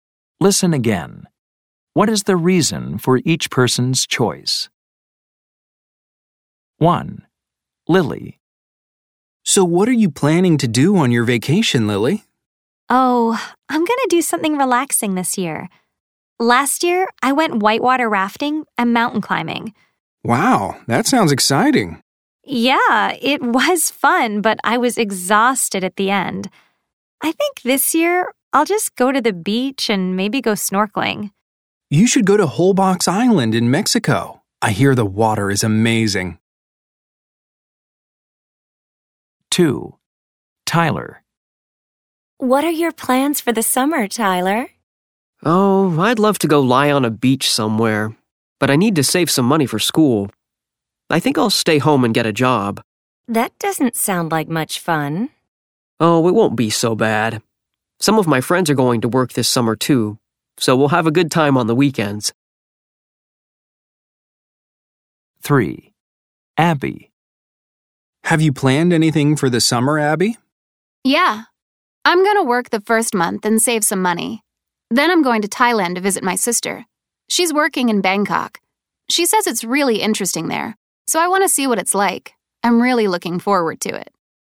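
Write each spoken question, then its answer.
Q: What is the reason for each person's choice?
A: Lily wants something relaxing because last year's adventure vacation left her exhausted

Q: What is the reason for each person's choice?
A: Tyler needs to save money for school

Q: What is the reason for each person's choice?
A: Abby wants to visit her sister in Bangkok and see what Thailand is like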